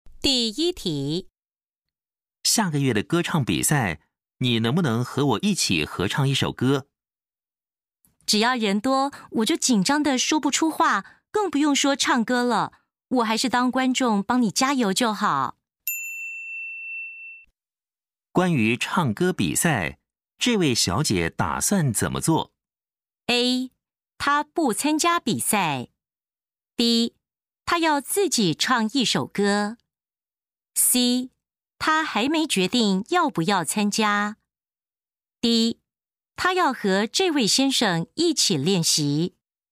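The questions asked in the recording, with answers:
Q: 关于唱歌比赛,这位小姐打算怎么做?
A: A: 她不参加比赛。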